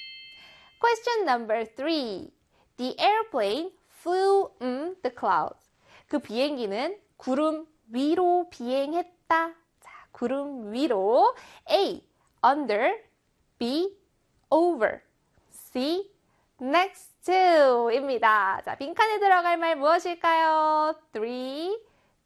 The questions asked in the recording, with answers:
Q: A, under. B, over. C, next to. 입니다. 자, 빈칸에 들어갈 말 무엇일까요?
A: 그렇죠. B의 over이 되겠죠.